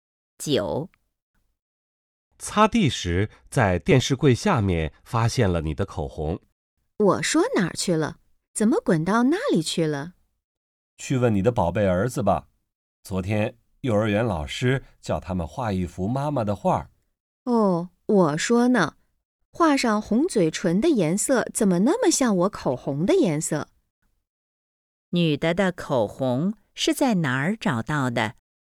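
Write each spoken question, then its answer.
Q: 女的的口红是在哪儿找到的?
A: 电视柜下面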